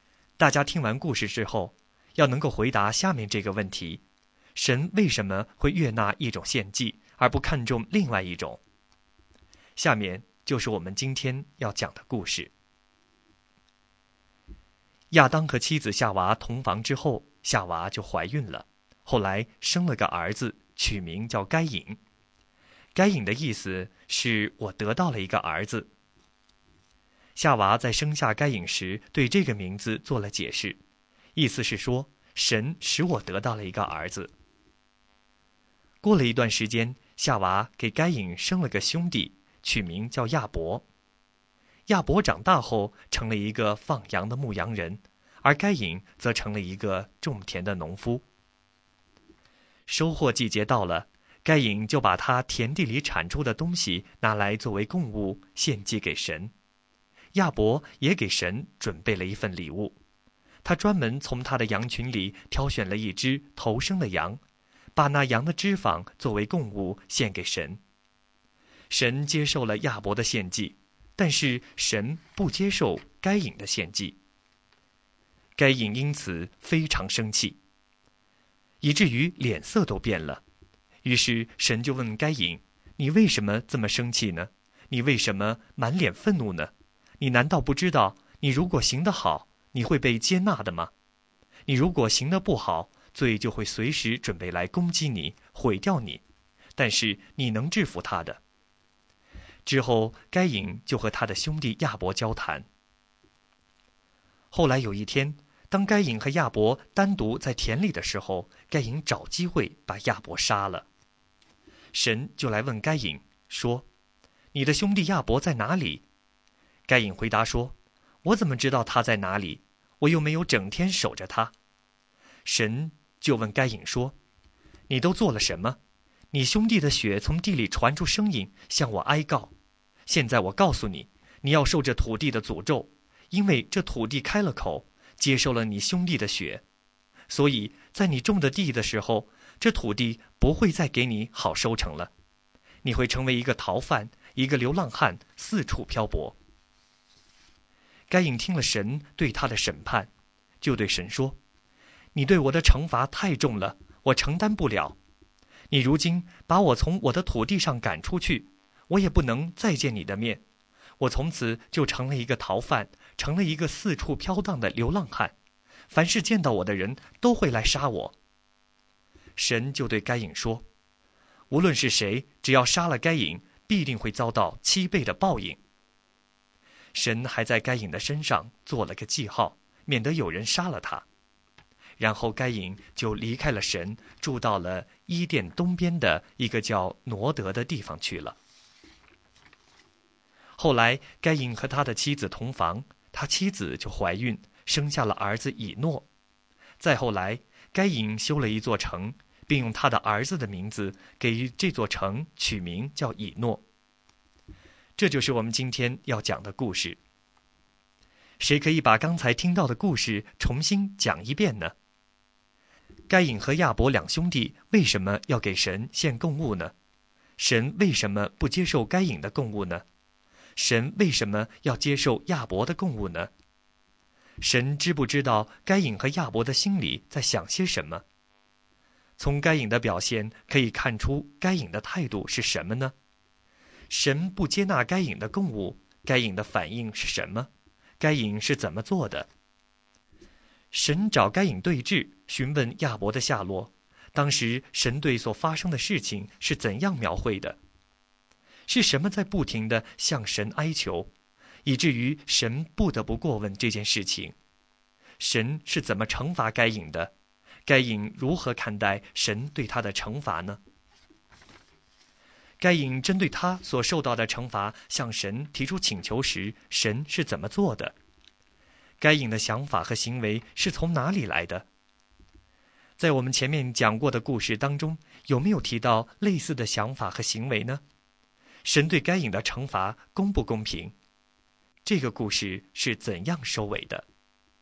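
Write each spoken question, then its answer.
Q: 神不接纳该隐的供物,该隐的反应是什么?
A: 非常生气,以至于脸色都变了

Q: 是什么在不停地向神哀求,以至于神不得不过问这件事情?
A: 亚伯的血从地里发出声音向神哀告

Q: 神是怎么惩罚该隐的?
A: 受土地的诅咒,土地不再给他好收成,他成为逃犯和四处漂泊的流浪汉

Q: 该隐如何看待神对他的惩罚呢?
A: 觉得惩罚太重,承担不了

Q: 该隐针对他所受到的惩罚向神提出请求时,神是怎么做的?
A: 神说杀该隐的人必遭七倍报应,并在该隐身上做了记号,免得有人杀他

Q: 这个故事是怎样收尾的?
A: 该隐住到伊甸东边的挪德,生了儿子以诺,又建了一座城,用儿子的名字叫以诺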